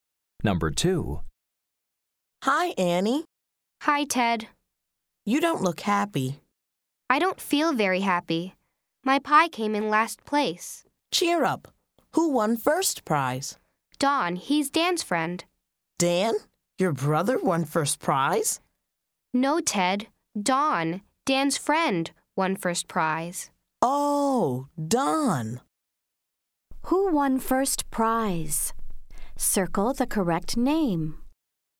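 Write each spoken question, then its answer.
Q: Who won first prize? Circle the correct name.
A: Don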